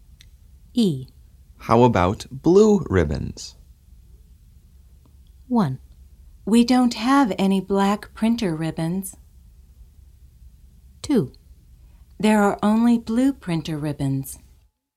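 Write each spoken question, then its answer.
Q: How about blue ribbons?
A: 1: We don't have any black printer ribbons.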